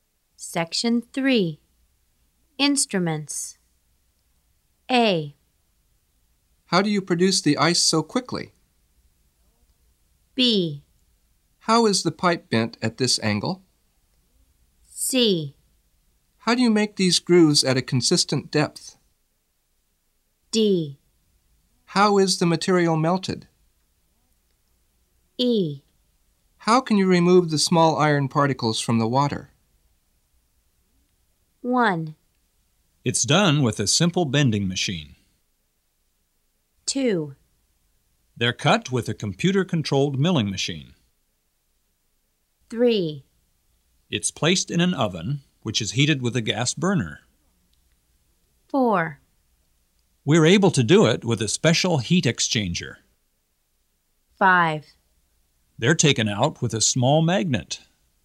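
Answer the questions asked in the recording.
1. B: How is the pipe bent at this angle?
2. C: How do you make these grooves at a consistent depth?
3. D: How is the material melted?
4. A: How do you produce the ice so quickly?
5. E: How can you remove the small iron particles from the water?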